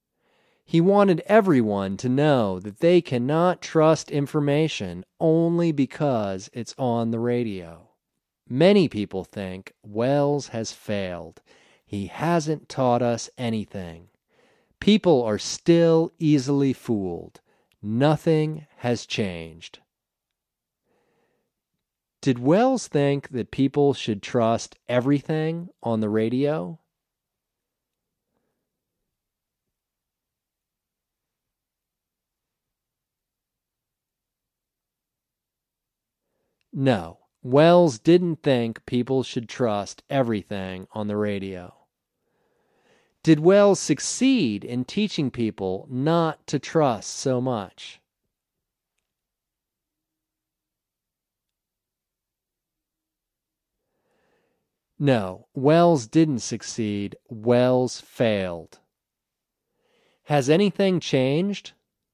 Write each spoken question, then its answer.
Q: Did Welles think that people should trust everything on the radio?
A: No, Welles didn't think people should trust everything on the radio.

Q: Has anything changed?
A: No, nothing has changed.